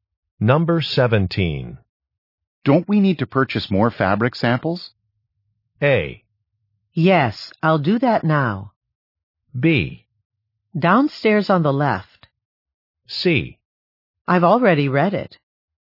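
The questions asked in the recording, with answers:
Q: Don't we need to purchase more fabric samples?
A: A: Yes, I'll do that now.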